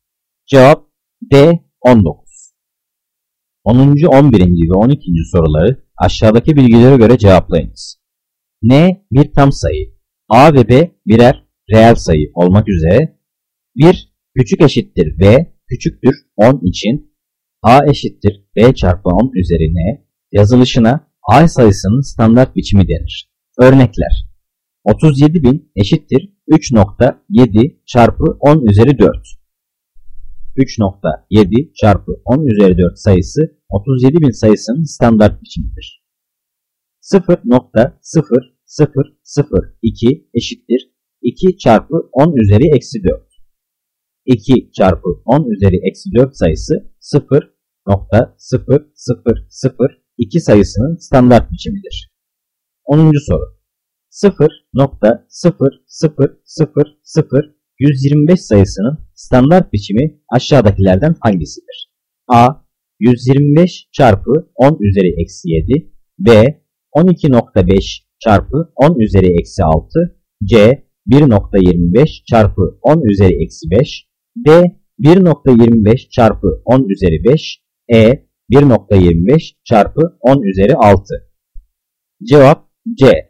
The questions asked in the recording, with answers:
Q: 0.0000125 sayısının standart biçimi aşağıdakilerden hangisidir?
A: Cevap C. 1.25 çarpı 10 üzeri eksi 5